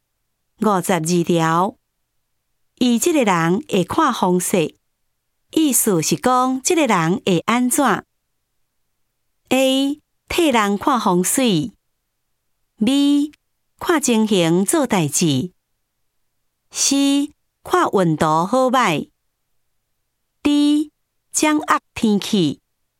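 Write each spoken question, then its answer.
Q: 伊这个人会看风势,意思是讲这个人会安怎 ?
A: B: 看情形做代志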